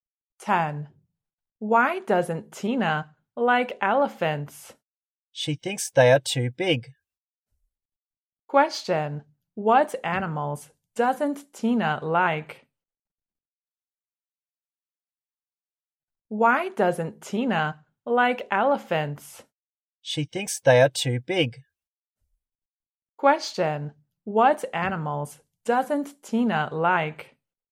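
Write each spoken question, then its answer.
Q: Question, what animals doesn't Tina like?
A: Elephants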